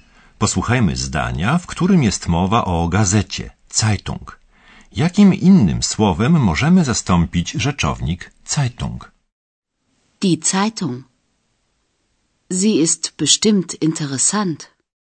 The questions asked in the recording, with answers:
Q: Jakim innym słowem możemy zastąpić rzeczownik Zeitung?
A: Słowo Zeitung możemy zastąpić zaimkiem sie.